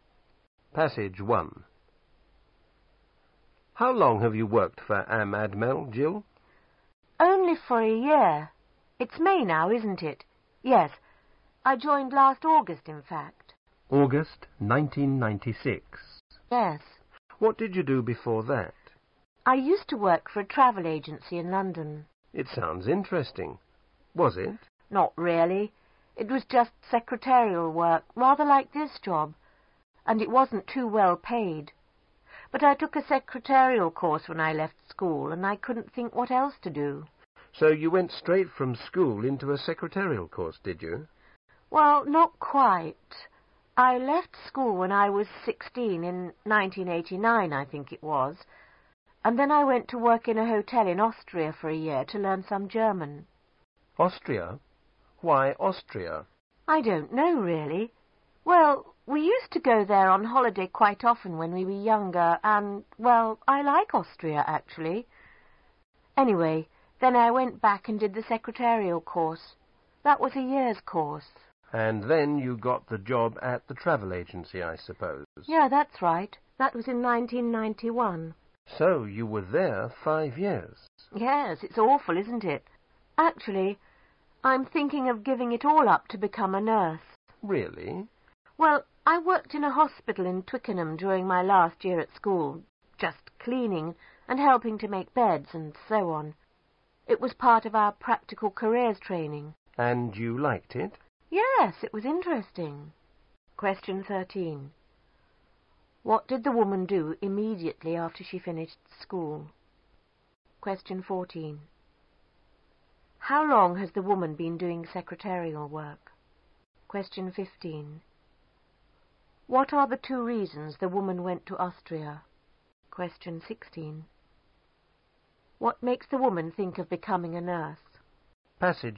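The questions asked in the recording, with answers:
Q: What did the woman do immediately after she finished school?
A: She worked in a hotel in Austria for a year

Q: How long has the woman been doing secretarial work?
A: About six years

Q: What are the two reasons the woman went to Austria?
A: To learn German and because she liked Austria

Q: What makes the woman think of becoming a nurse?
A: She enjoyed working in a hospital during her last year at school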